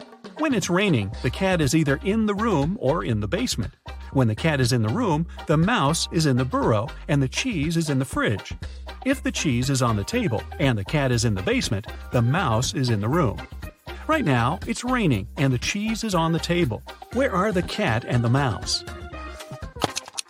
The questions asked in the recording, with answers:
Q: Where are the cat and the mouse?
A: It means the cat is in the basement.